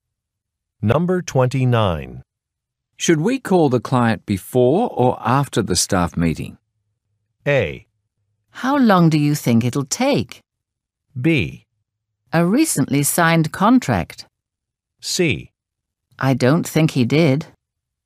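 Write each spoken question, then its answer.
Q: Should we call the client before or after the staff meeting?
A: A: How long do you think it'll take?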